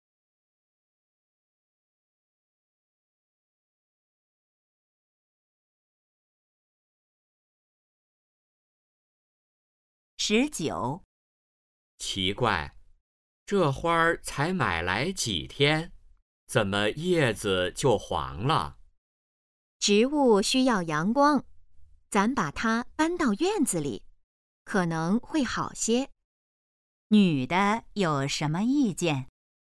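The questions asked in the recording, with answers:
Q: 女的有什么意见?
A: 把花搬到院子里晒太阳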